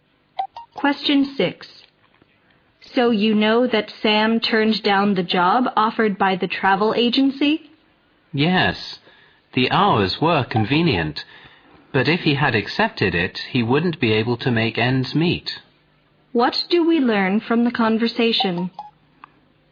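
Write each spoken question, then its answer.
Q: What do we learn from the conversation?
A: Sam turned down the job because the pay was too low to live on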